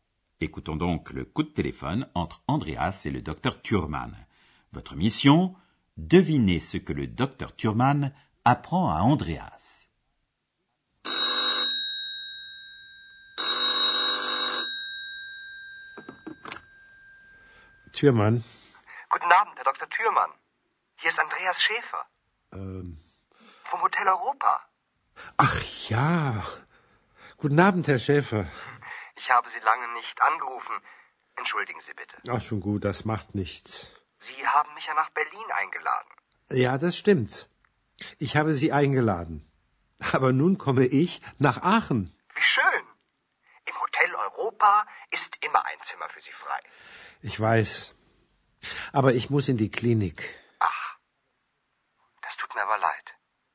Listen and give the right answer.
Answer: Premièrement, que le docteur Thurman va venir à Aix-la-Chapelle. Et secondo, que le docteur Thurman doit entrer en clinique.